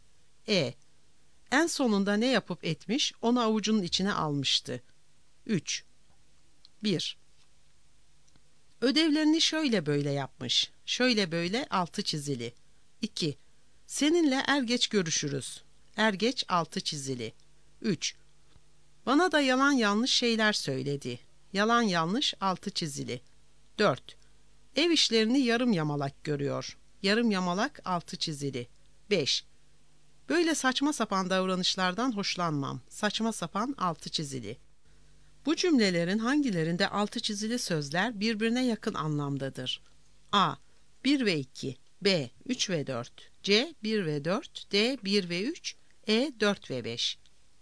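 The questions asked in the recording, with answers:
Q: Bu cümlelerin hangilerinde altı çizili sözler birbirine yakın anlamdadır?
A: C: 1 ve 4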